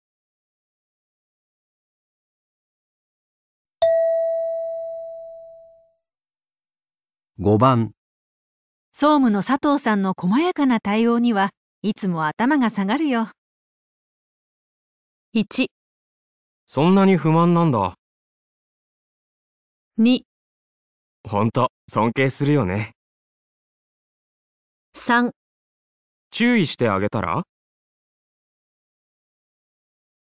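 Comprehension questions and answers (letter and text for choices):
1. 総務の佐藤さんの細やかな対応にはいつも頭がさがるよメイ。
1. そんなに不満なんだ。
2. ほんと、 尊敬するよね。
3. 注意してあげたら?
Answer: 2. ほんと、 尊敬するよね。

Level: 【N1 第1回】聴解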